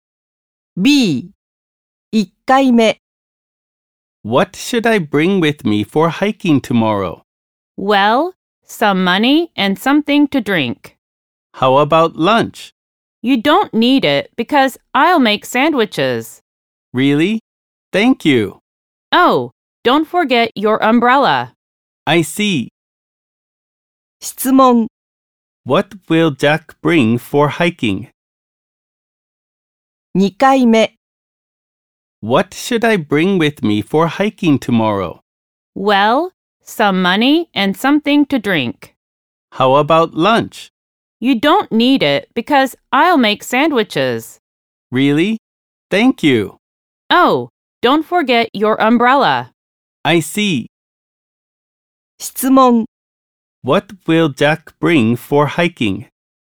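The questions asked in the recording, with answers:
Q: What will Jack bring for hiking?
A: Some money, something to drink, and an umbrella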